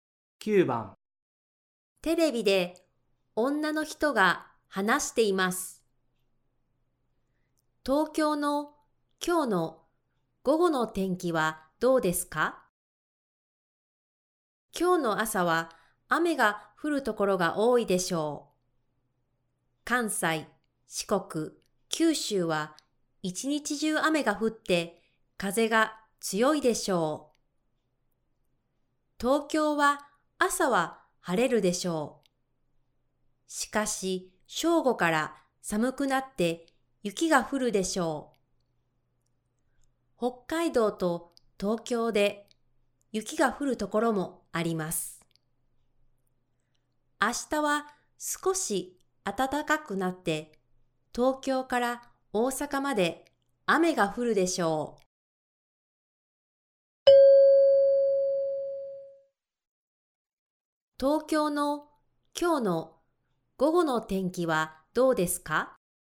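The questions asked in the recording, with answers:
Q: 東京の今日の午後の天気はどうですか?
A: 寒くなって雪が降る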